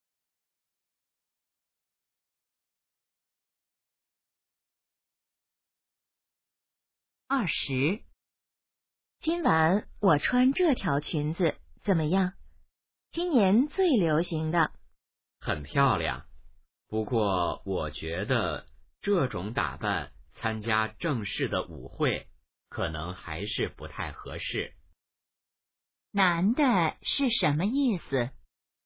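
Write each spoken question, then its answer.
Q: 男的是什么意思?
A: 这条裙子不适合参加正式舞会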